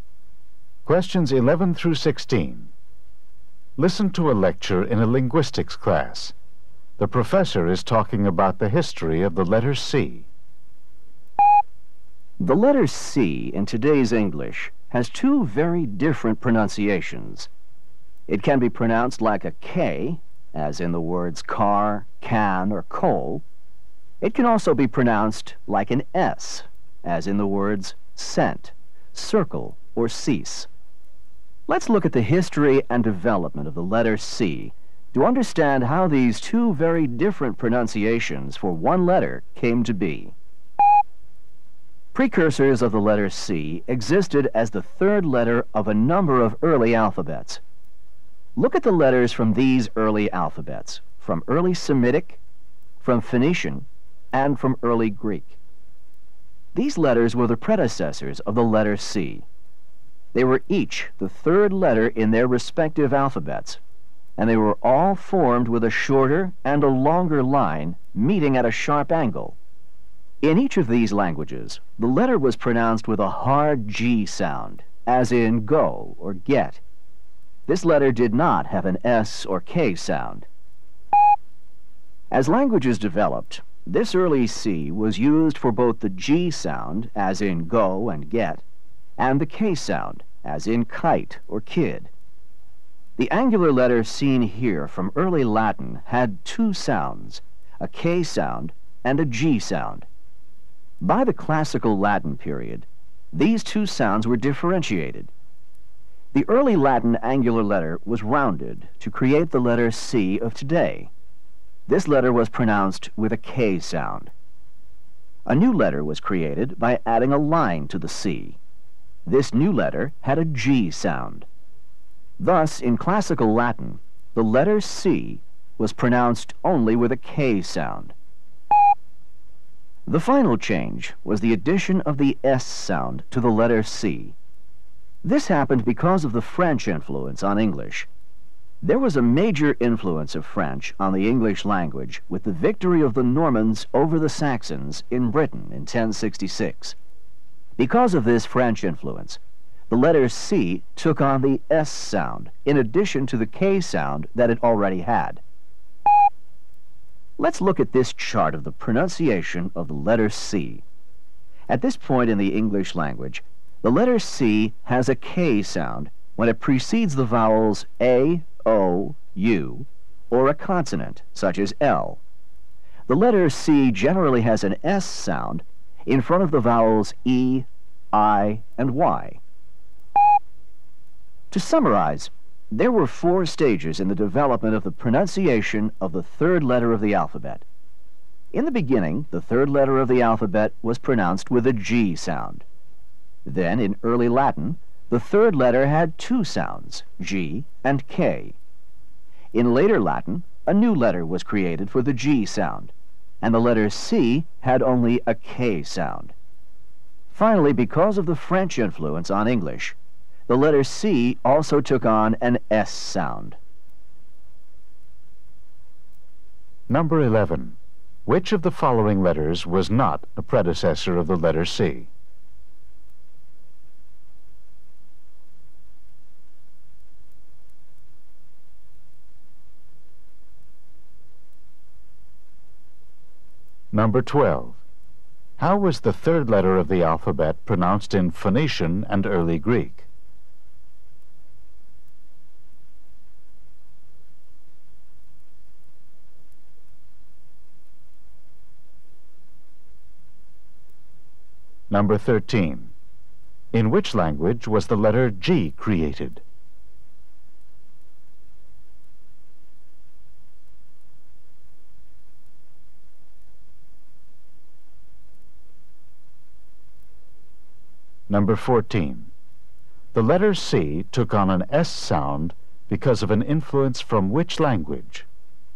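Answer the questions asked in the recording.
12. With a hard G sound
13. Classical Latin
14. French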